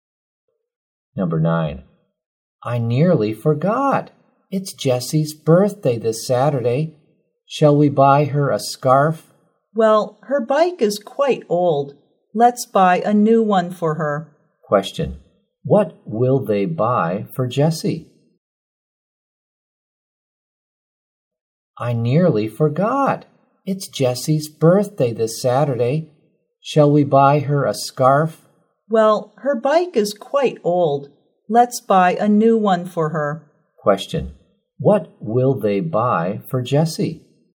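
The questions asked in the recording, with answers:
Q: Question. What will they buy for Jessie?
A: A new bike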